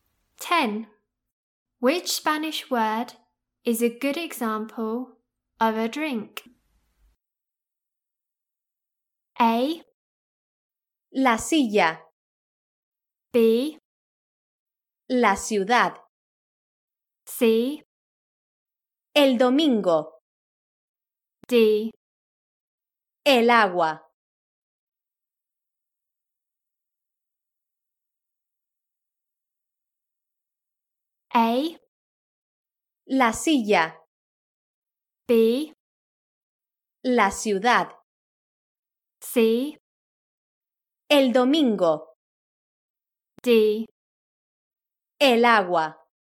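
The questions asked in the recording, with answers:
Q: Which Spanish word is a good example of a drink?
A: D: El agua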